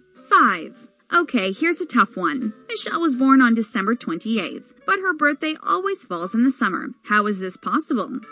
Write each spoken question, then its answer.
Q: How is this possible?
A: The answer is Michelle lives in the Southern Hemisphere.